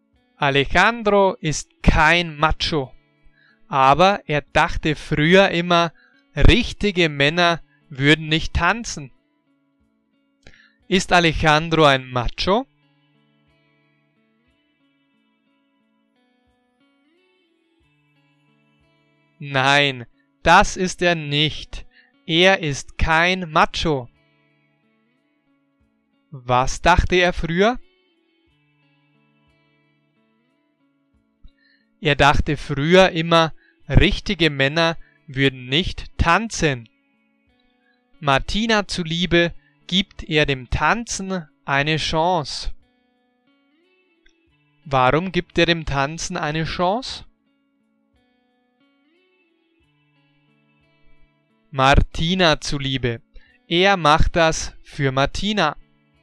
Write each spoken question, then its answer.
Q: Ist Alejandro ein Macho?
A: Nein, das ist er nicht. Er ist kein Macho.

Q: Was dachte er früher?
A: Er dachte früher immer, richtige Männer würden nicht tanzen.